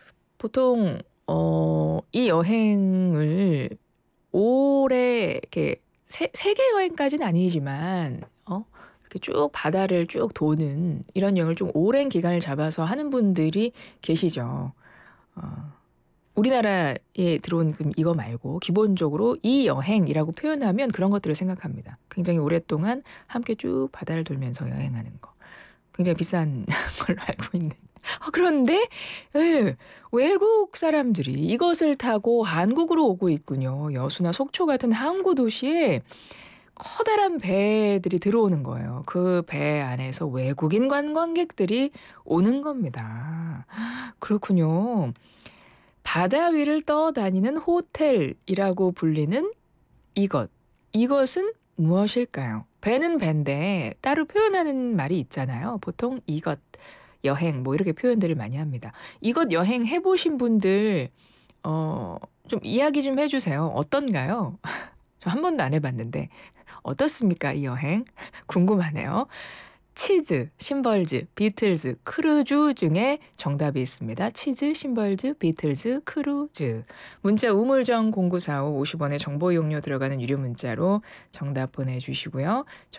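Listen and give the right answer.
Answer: 4: 크루즈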